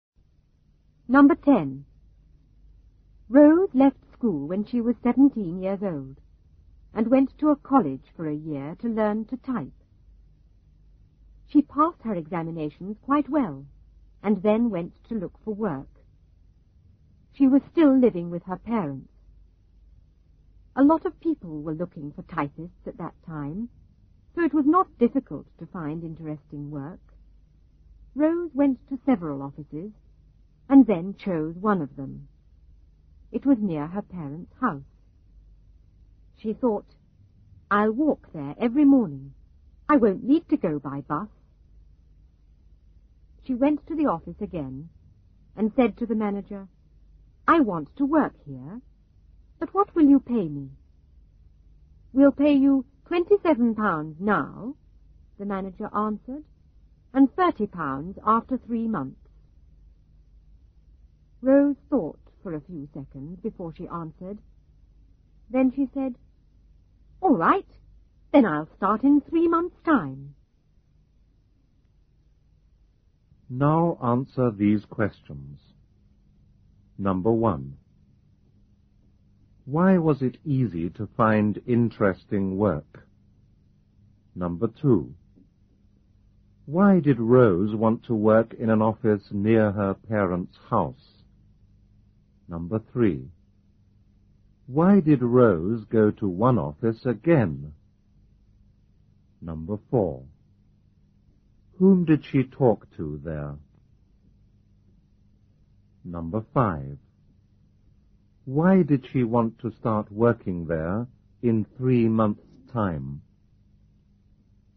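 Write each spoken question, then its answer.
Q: Why was it easy to find interesting work?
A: A lot of people were looking for typists at that time.

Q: Why did Rose want to work in an office near her parents' house?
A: She could walk there every morning and wouldn't need to go by bus.

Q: Why did Rose go to one office again?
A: She had chosen it and wanted to work there and ask about pay.

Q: Whom did she talk to there?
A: The manager.

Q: Why did she want to start working there in 3 months' time?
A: Because the pay would be £30 after 3 months instead of £27.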